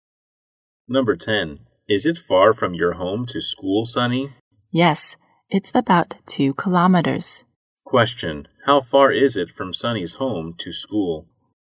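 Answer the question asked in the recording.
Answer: About 2 kilometers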